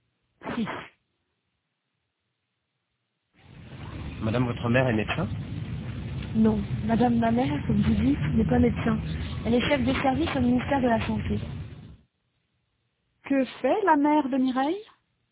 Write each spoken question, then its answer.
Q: Que fait la mère de Mireille?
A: Elle est chef de service au ministère de la Santé.